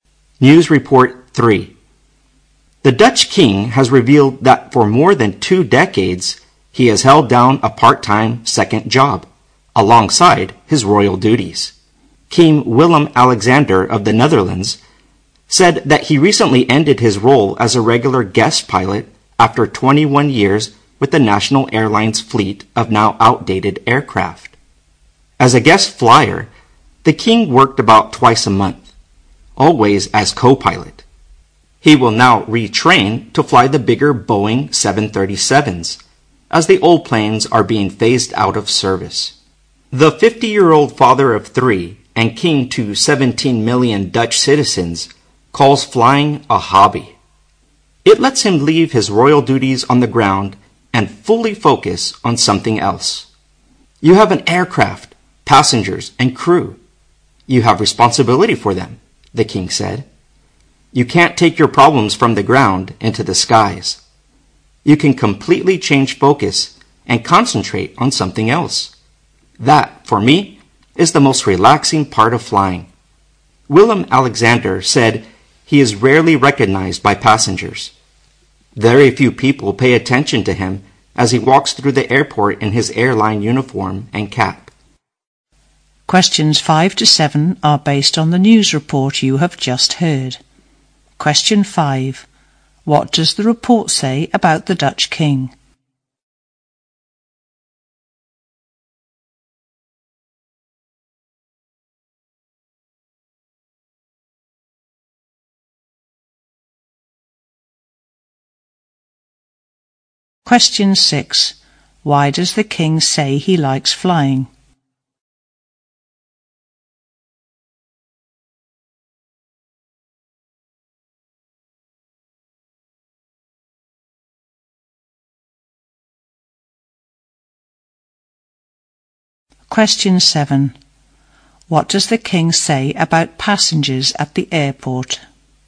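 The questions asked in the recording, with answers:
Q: What does the report say about the Dutch king?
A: He has worked part-time as a co-pilot for the national airline for 21 years.

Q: Why does the king say he likes flying?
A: It lets him leave his royal duties behind and focus on something else; he finds it relaxing.

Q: What does the king say about passengers at the airport?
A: They rarely recognize him.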